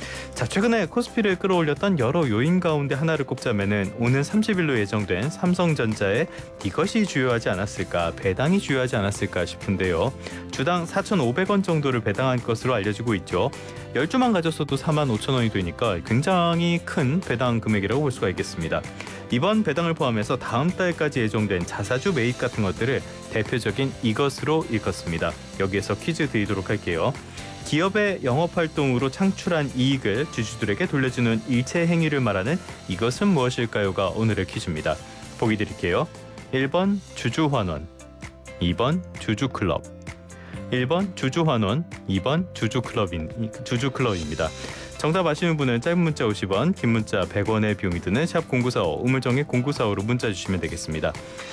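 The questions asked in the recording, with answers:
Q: 기업의 영업활동으로 창출한 이익을 주주들에게 돌려주는 일체 행위를 말하는 이것은 무엇일까요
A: 1번: 주주환원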